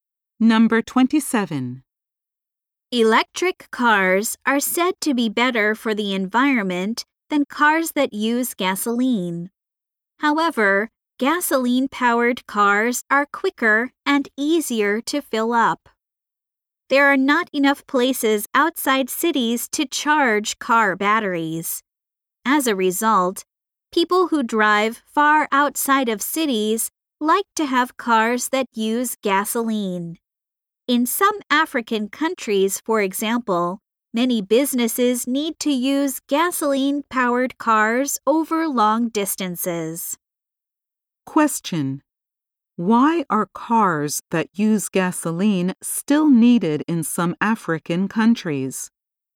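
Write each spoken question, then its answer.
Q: Why are cars that use gasoline still needed in some African countries?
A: Businesses drive long distances where there are few places to charge batteries.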